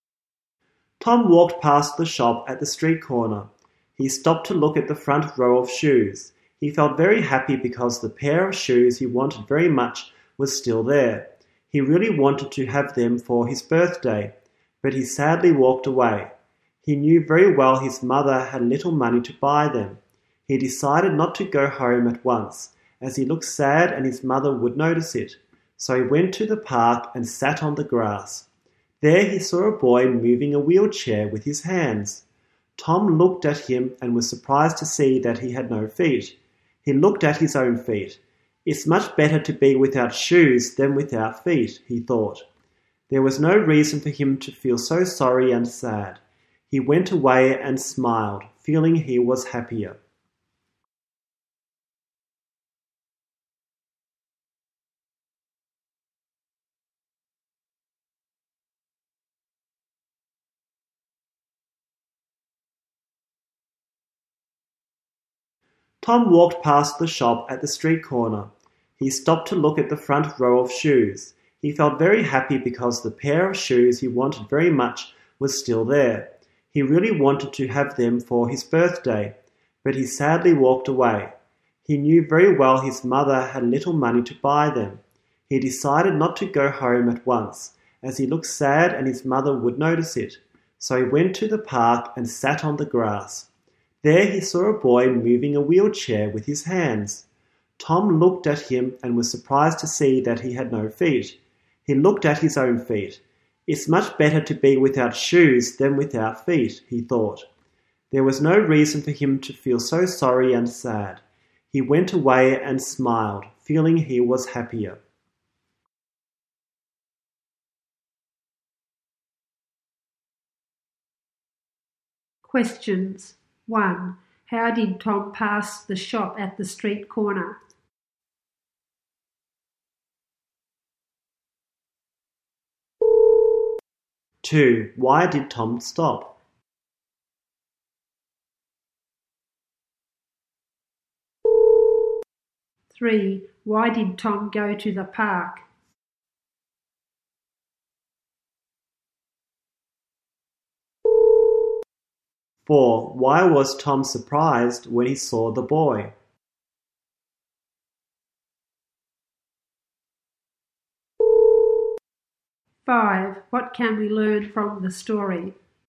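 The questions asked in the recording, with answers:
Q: How did Tom pass the shop at the street corner?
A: He walked past it

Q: Why did Tom stop?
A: To look at the shoes he wanted

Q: Why did Tom go to the park?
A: He looked sad and didn't want his mother to notice

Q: Why was Tom surprised when he saw the boy?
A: The boy had no feet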